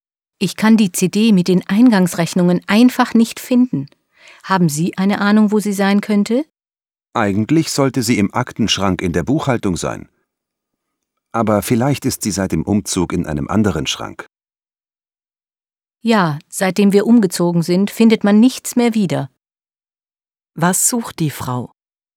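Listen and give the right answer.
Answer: Die CD mit den Eingangsrechnungen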